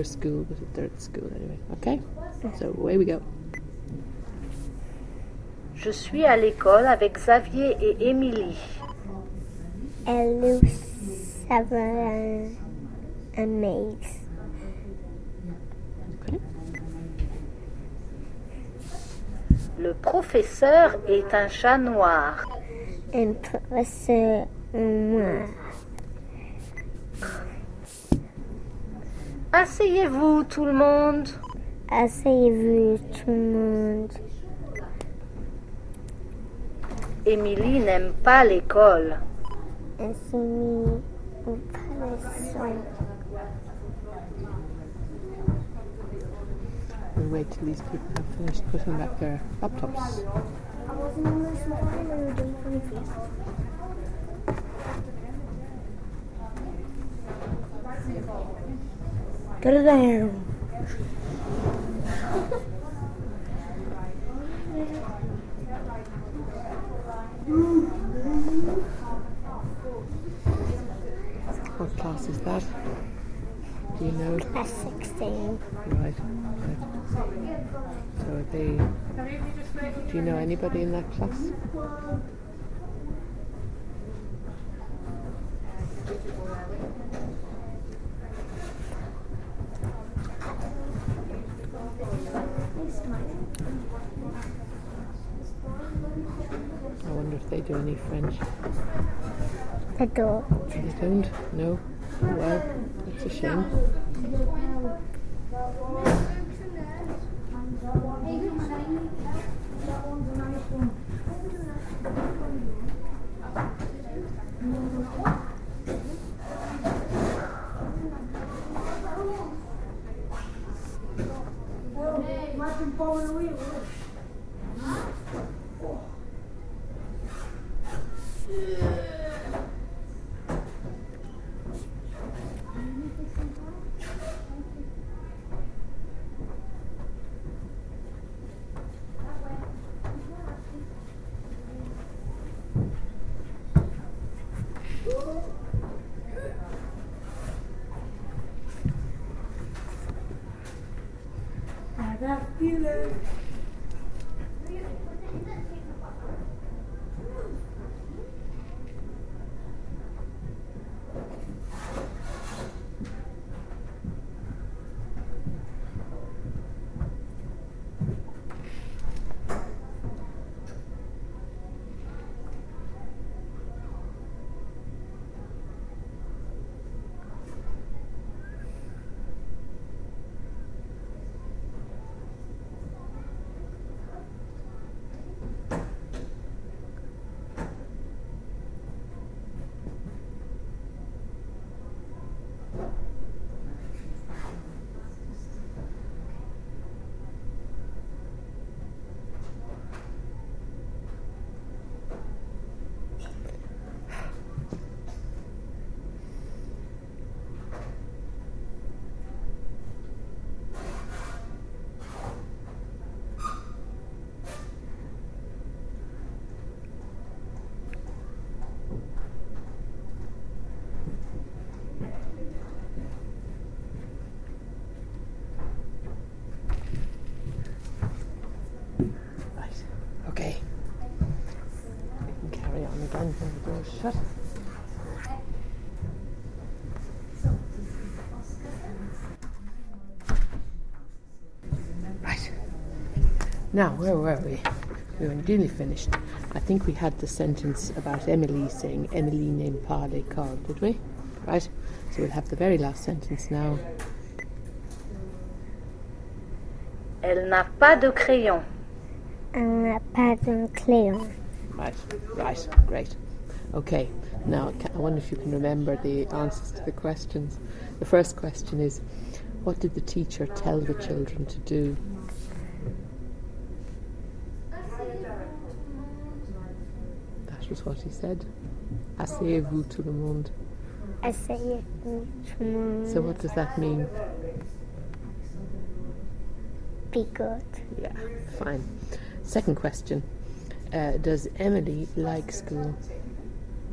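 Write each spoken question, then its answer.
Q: The first question is, what did the teacher tell the children to do?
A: Sit down, everyone

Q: Does Emily like school?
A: No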